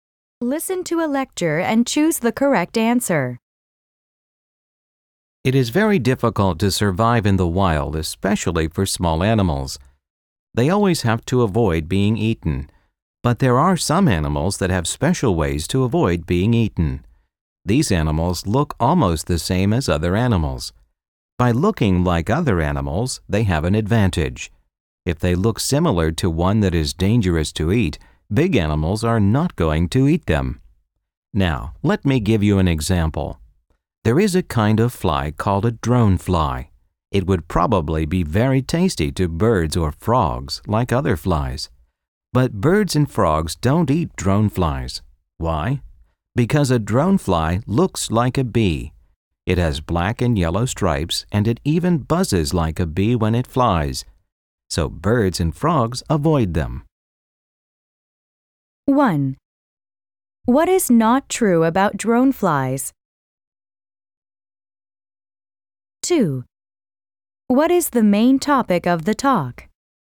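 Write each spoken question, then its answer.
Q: What is the main topic of the talk?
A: How some small animals avoid being eaten by looking like dangerous animals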